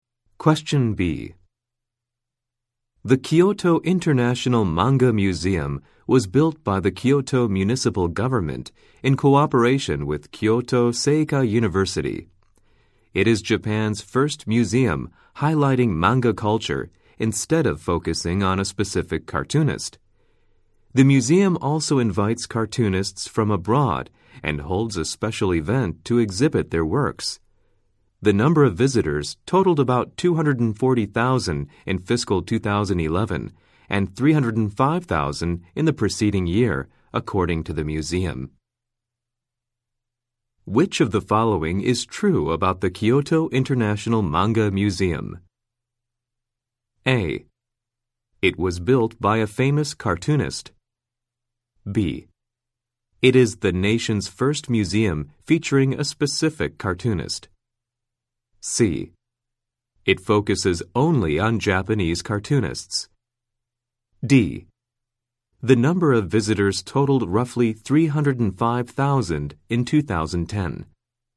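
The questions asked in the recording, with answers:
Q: Which of the following is true about the Kyoto International Manga Museum?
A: D: The number of visitors totaled roughly 305,000 in 2010.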